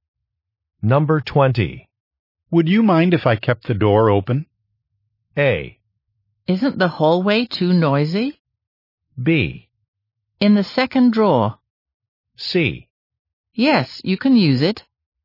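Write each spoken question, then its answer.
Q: Would you mind if I kept the door open?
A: A: Isn't the hallway too noisy?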